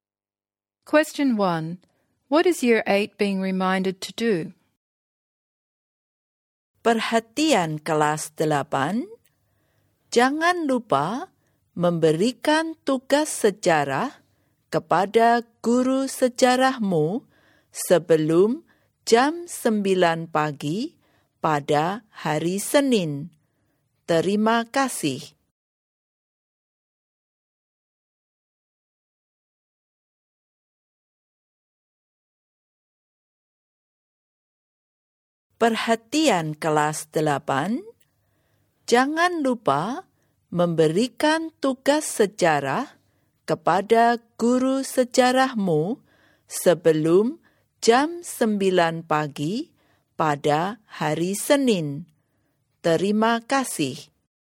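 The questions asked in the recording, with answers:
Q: What is Year 8 being reminded to do?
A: To give their history assignment to their history teacher before 9 am on Monday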